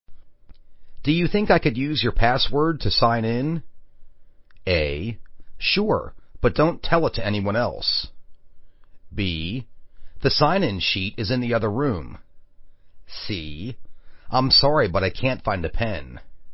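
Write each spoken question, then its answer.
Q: Do you think I could use your password to sign in?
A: A: Sure, but don't tell it to anyone else.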